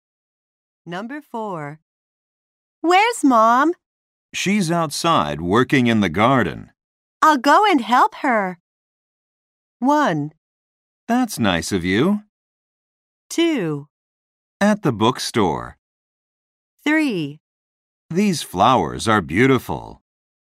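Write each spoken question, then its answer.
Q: I'll go and help her.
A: 1: That's nice of you.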